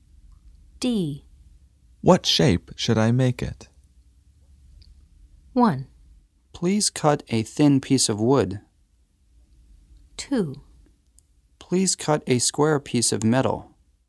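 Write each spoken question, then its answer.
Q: What shape should I make it?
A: 2: Please cut a square piece of metal.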